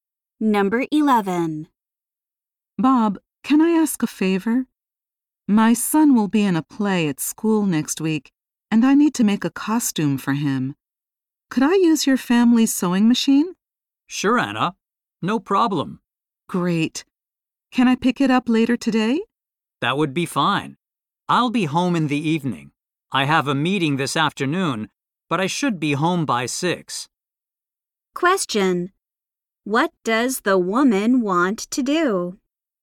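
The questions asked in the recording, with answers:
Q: What does the woman want to do?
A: Borrow Bob's family's sewing machine.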